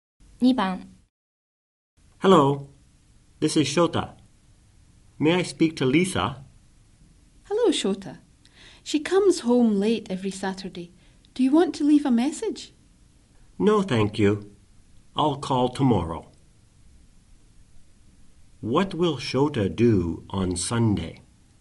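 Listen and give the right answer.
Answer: He will call Lisa again.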